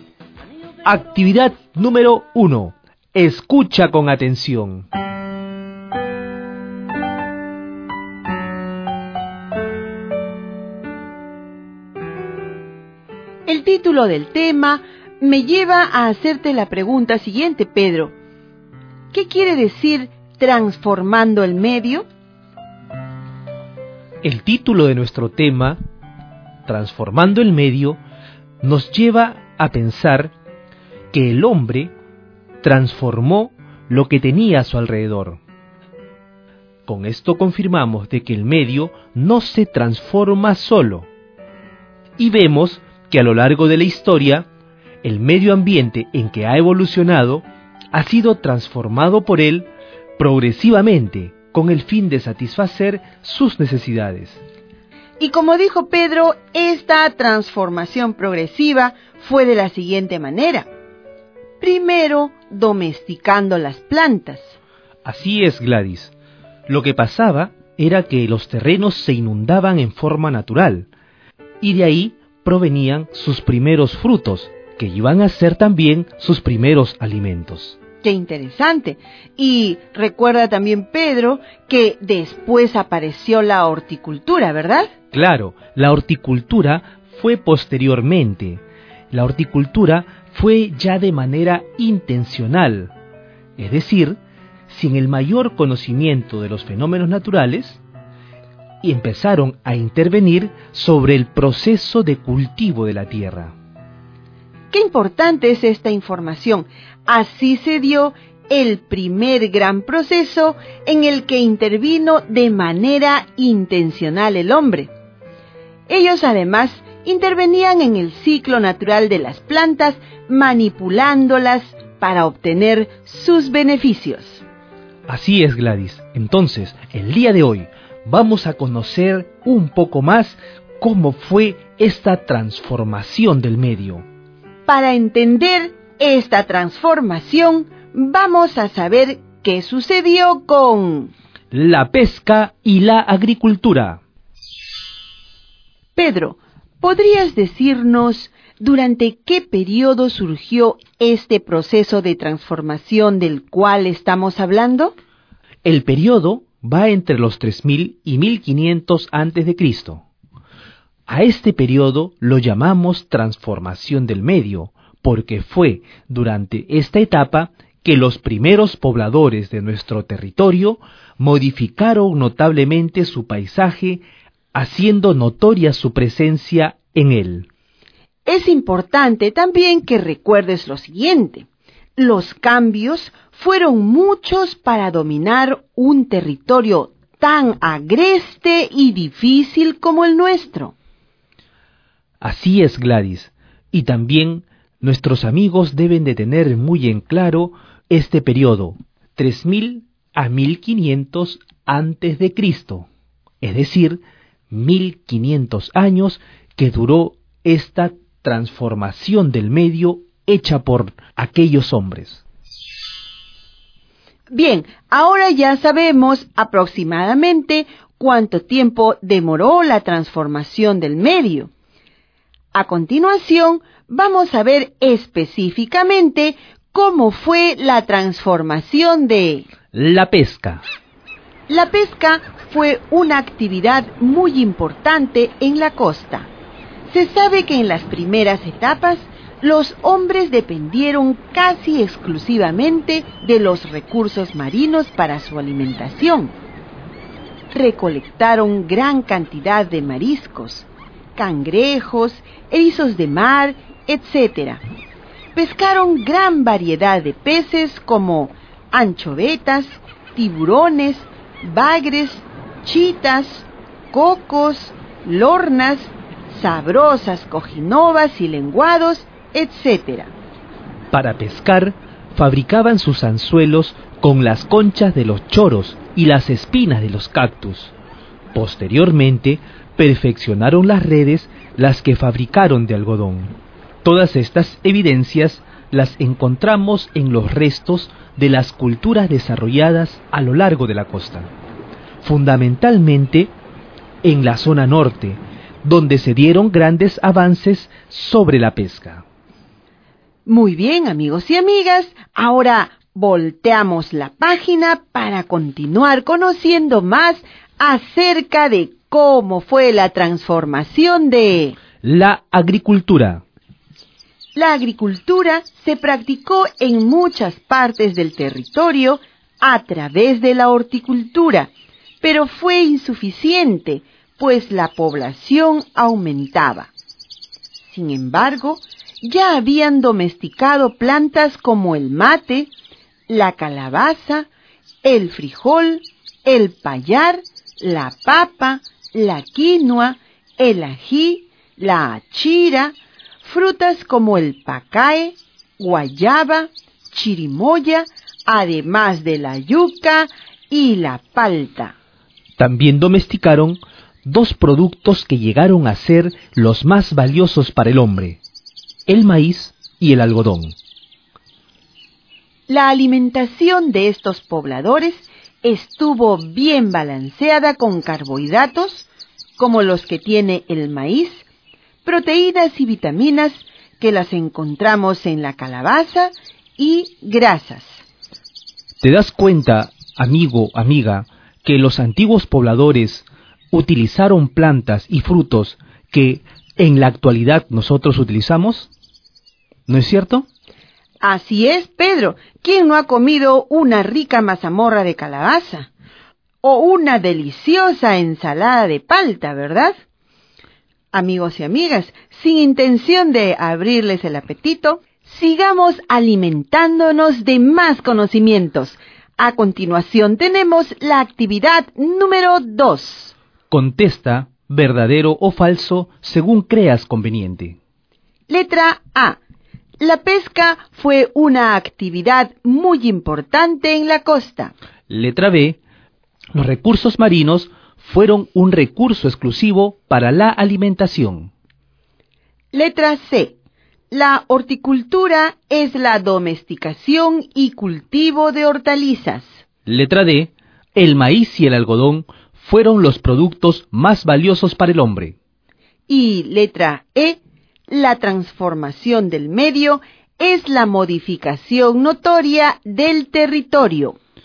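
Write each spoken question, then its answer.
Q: La pesca fue una actividad muy importante en la costa.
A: Verdadero

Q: El maíz y el algodón fueron los productos más valiosos para el hombre.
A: Verdadero

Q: La transformación del medio es la modificación notoria del territorio.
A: Verdadero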